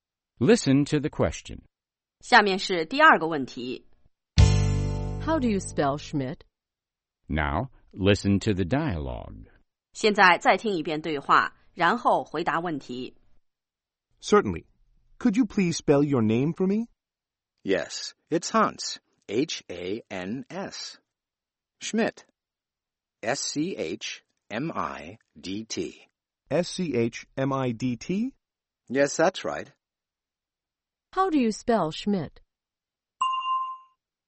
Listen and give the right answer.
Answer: S-C-H.M-I-D-T.